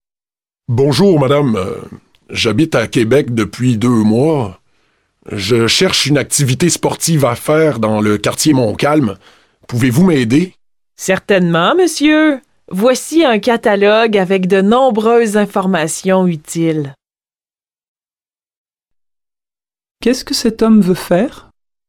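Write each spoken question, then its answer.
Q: Qu'est-ce que cet homme veut faire?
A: Une activité sportive dans le quartier Montcalm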